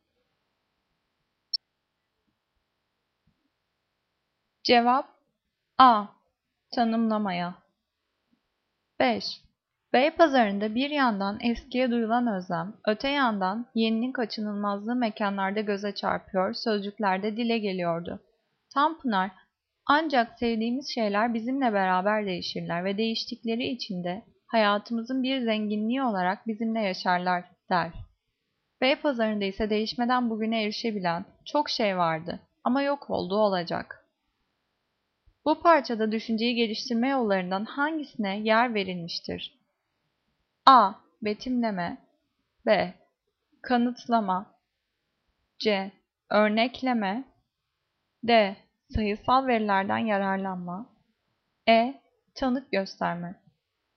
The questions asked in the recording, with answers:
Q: Bu parçada düşünceyi geliştirme yollarından hangisine yer verilmiştir?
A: Cevap E. Tanık gösterme.